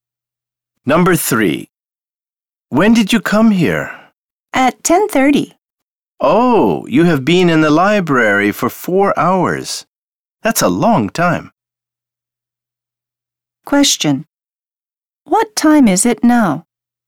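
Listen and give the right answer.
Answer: 2:30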